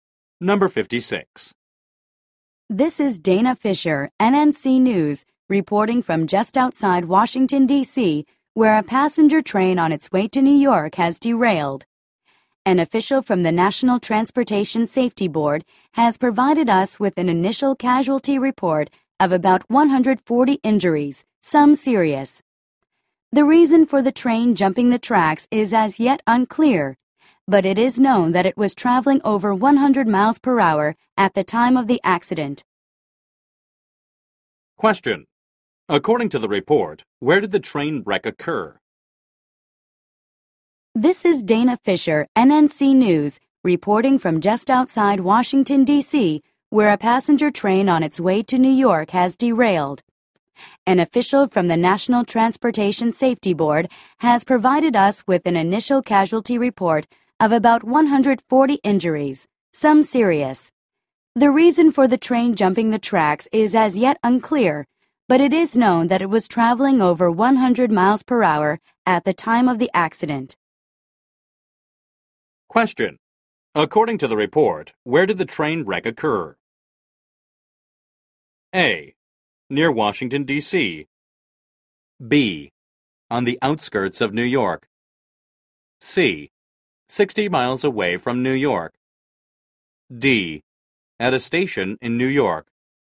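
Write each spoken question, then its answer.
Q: According to the report, where did the train wreck occur?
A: A: Near Washington, D.C.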